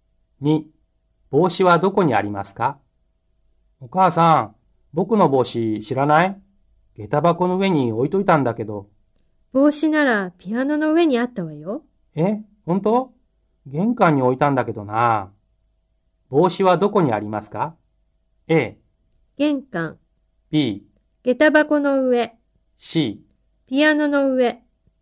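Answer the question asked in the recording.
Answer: C: ピアノの上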